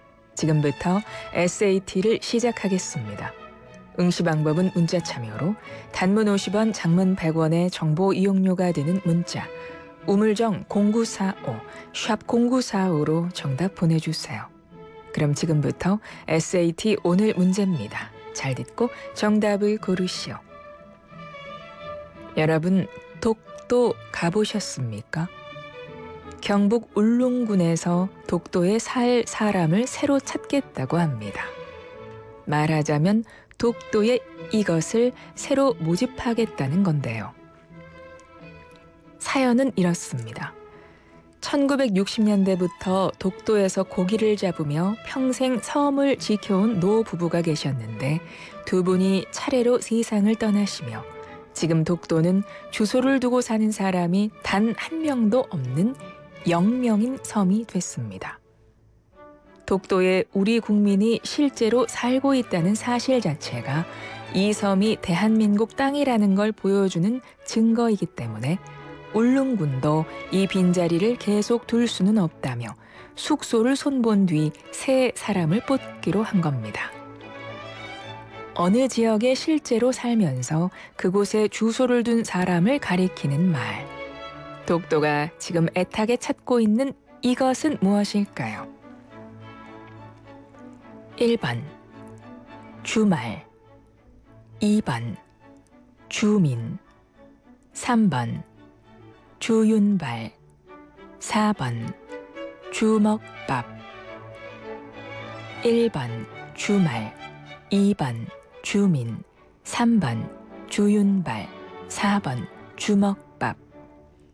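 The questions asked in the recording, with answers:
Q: 독도가 지금 애타게 찾고 있는 이것은 무엇일까요?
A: 2: 주민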